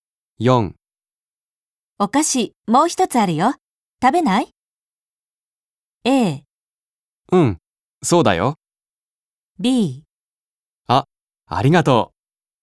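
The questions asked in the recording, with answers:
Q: お菓子もう一つあるよ。食べない?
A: B: あ、ありがとう。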